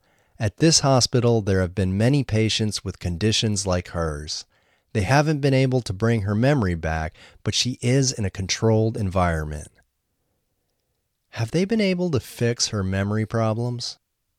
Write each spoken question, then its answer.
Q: Have they been able to fix her memory problems?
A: No, they haven't been able to fix her memory problems.